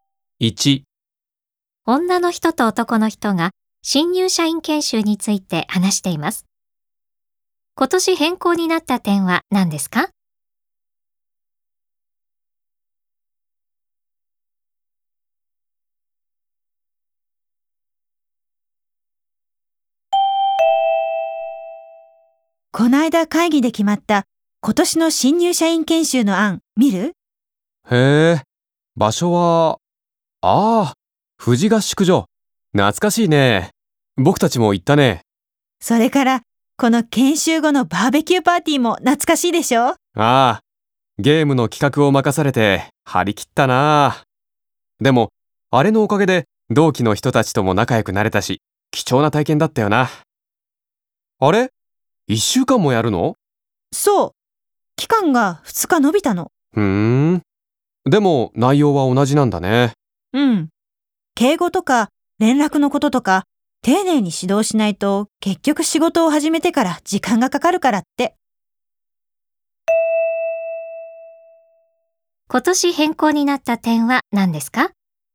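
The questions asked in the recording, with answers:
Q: 今年変更になった点は何ですか?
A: 研修の期間が2日伸びて一週間になったこと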